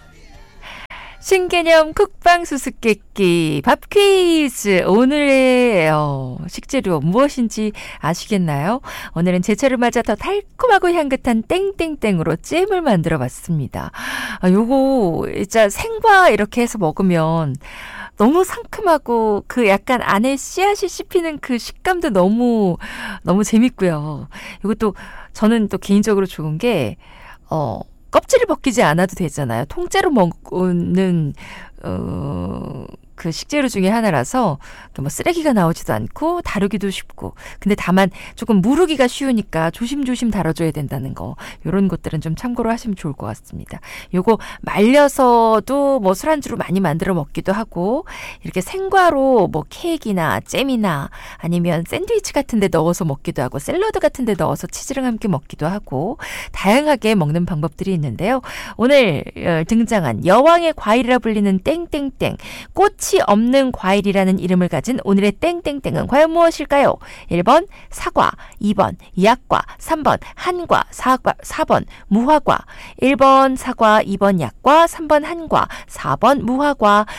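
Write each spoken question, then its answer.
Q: 오늘 등장한 여왕의 과일이라 불리는 땡땡땡, 꽃 꽃이 없는 과일이라는 이름을 가진 오늘의 땡땡땡은 과연 무엇일까요?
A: 4: 무화과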